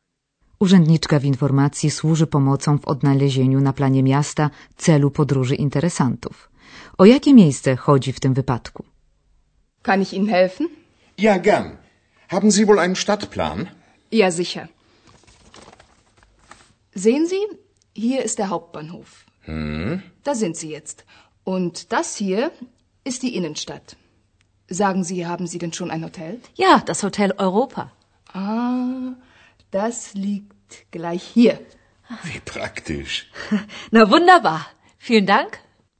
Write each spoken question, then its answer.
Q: O jakie miejsce chodzi w tym wypadku?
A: A zatem celem podróży okazuje się znany nam skądinąd Hotel Europa.